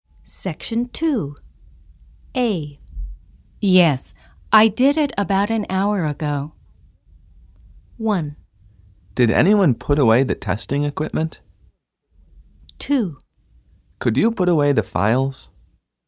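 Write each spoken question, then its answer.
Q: Yes, I did it about an hour ago.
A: 1: Did anyone put away the testing equipment?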